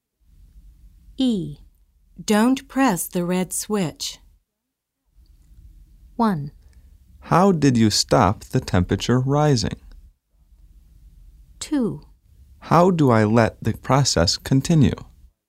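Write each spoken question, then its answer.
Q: Don't press the red switch.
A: 2: How do I let the process continue?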